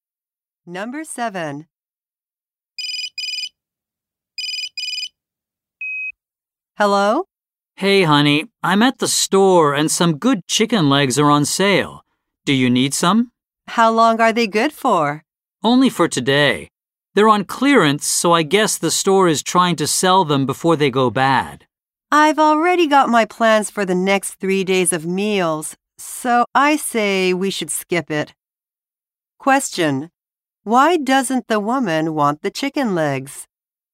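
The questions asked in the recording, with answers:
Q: Why doesn't the woman want the chicken legs?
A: She has already planned meals for the next 3 days, and the chicken is only good for today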